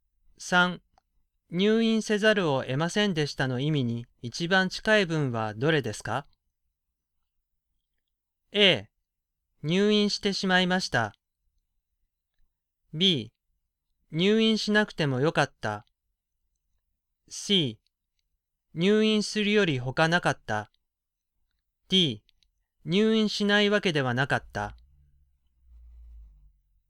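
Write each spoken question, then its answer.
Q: 入院せざるを得ませんでしたの意味に一番近い文はどれですか?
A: C: 入院するより他なかった。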